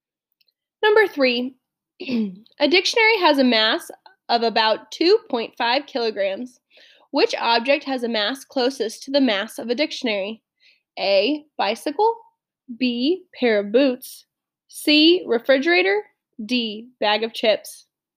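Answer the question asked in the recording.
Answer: B: pair of boots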